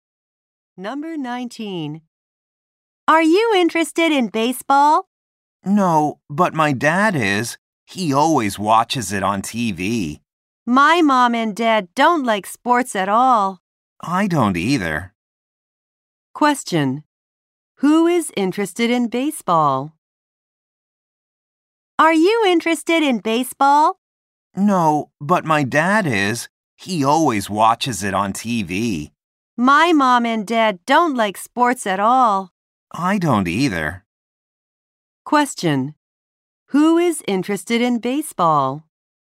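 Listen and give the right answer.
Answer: The boy's dad.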